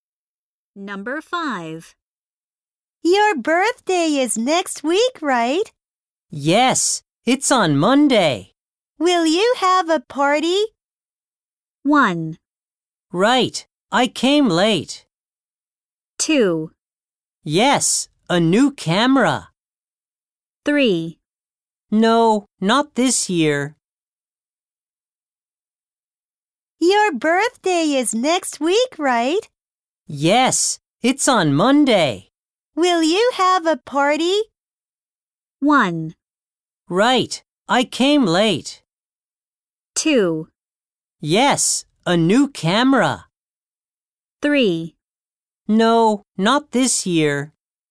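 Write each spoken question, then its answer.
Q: Will you have a party?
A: 3: No, not this year.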